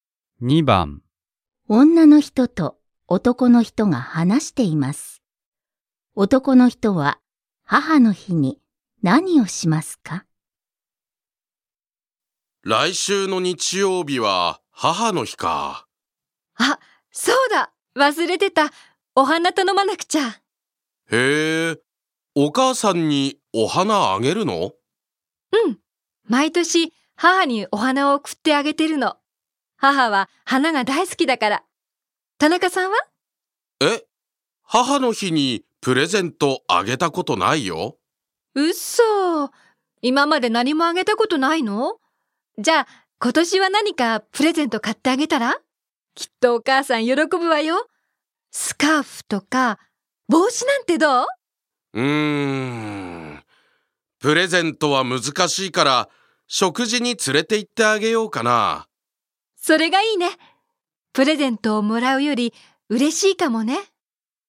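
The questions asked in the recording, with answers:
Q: 男の人は母の日に何をしますか?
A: お母さんを食事に連れて行く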